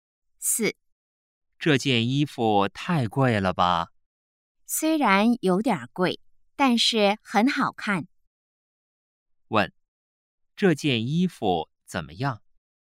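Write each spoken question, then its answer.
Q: 问,这件衣服怎么样?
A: 有点贵,但是很好看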